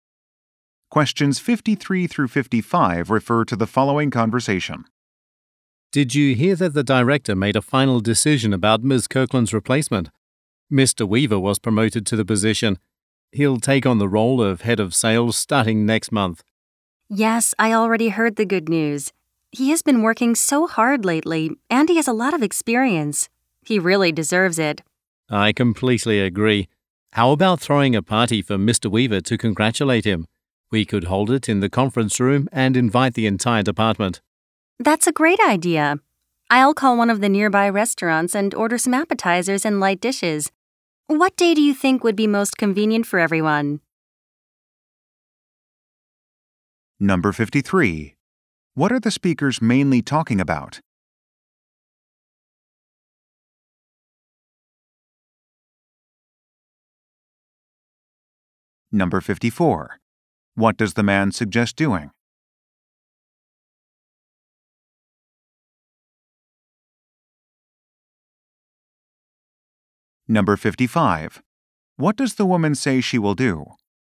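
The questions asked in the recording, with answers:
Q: What are the speakers mainly talking about?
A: Mr. Weaver's promotion

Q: What does the man suggest doing?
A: Throwing a party for Mr. Weaver

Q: What does the woman say she will do?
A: Order food from a nearby restaurant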